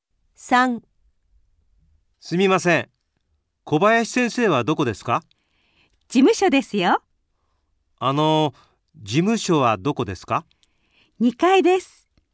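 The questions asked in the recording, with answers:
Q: すみません。小林先生はどこですか?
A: 事務所(2階)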